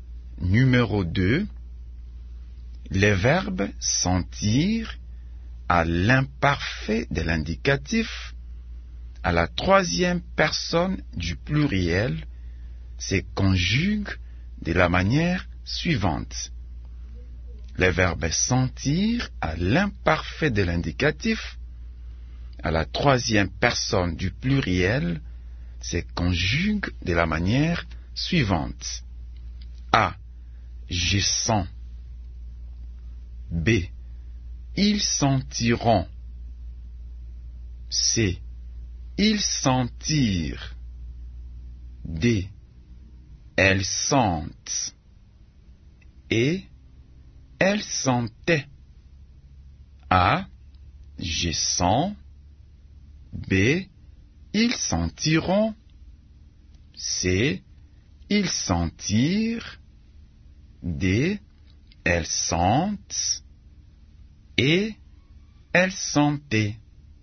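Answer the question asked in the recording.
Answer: E: Elles sentaient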